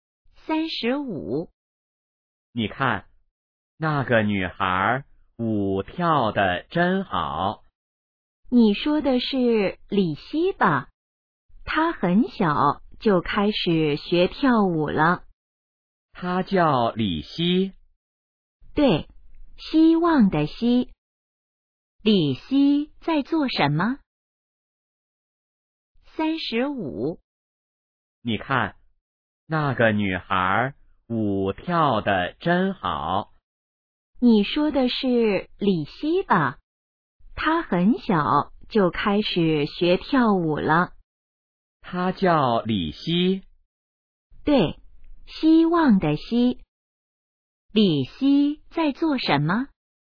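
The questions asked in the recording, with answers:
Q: 李希在做什么?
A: 跳舞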